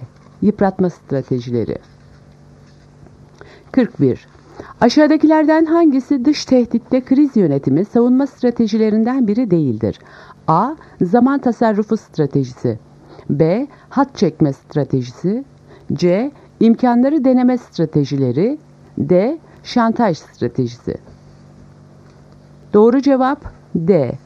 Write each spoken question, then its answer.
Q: Aşağıdakilerden hangisi dış tehditte kriz yönetimi savunma stratejilerinden biri değildir?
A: Doğru cevap D. Şantaj stratejisi.